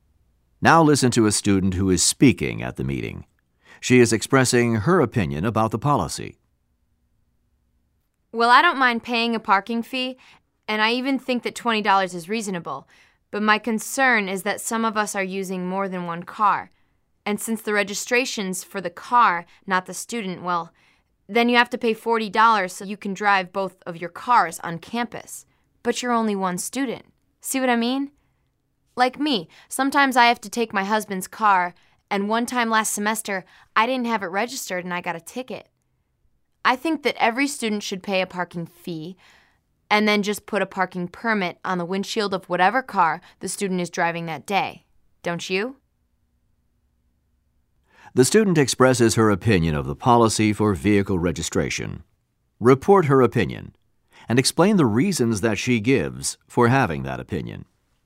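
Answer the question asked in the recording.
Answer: She thinks the $20 fee is fair, but registration should be per student, not per car. Students who drive more than one car must pay $40. She once got a ticket driving her husband's unregistered car. She wants one permit that can go on whatever car the student drives that day.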